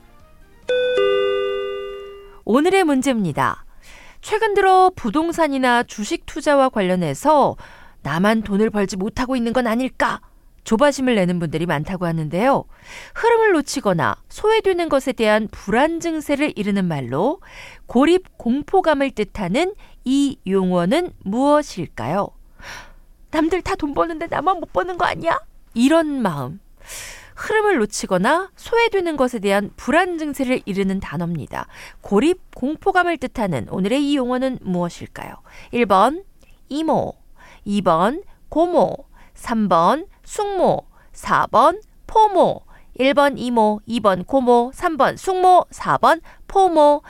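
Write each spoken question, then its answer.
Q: 고립 공포감을 뜻하는 오늘의 이 용어는 무엇일까요?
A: 4: 포모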